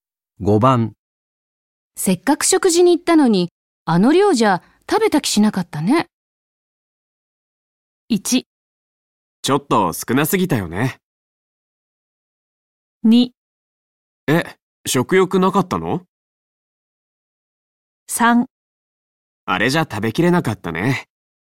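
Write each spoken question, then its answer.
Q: せっかく食事に行ったのに、あの量じゃ食べた気しなかったね。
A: 1: ちょっと少なすぎたよね。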